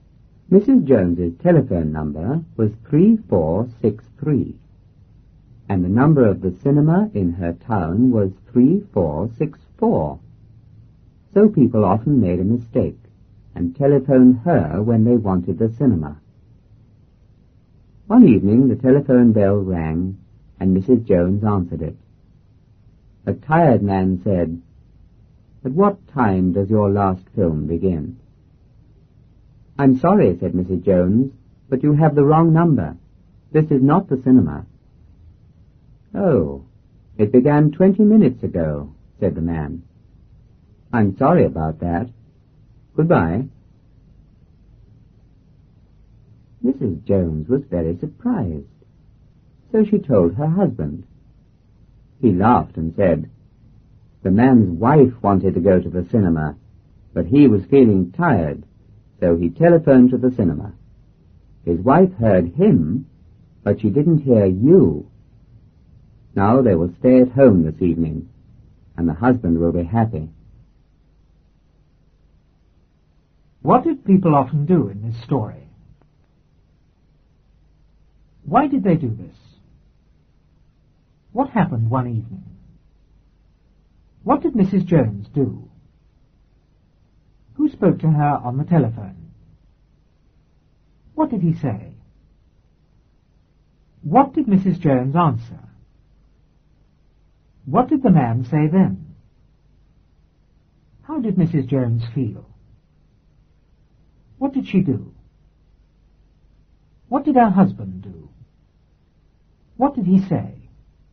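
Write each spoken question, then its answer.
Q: What did people often do in this story?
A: They telephoned Mrs. Jones by mistake when they wanted the cinema.

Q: Why did they do this?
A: Her number (3463) was almost the same as the cinema's (3464).

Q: What happened one evening?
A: The telephone bell rang.

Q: What did Mrs. Jones do?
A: She answered the telephone.

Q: Who spoke to her on the telephone?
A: A tired man.

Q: What did he say?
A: "At what time does your last film begin?"

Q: What did the man say then?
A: "Oh, it began 20 minutes ago. I'm sorry about that. Goodbye."

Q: How did Mrs. Jones feel?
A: Very surprised.

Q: What did she do?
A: She told her husband.

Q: What did her husband do?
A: He laughed.

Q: What did he say?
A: The man's wife wanted to go to the cinema, but he was tired, so he pretended to phone the cinema; now they will stay home and he will be happy.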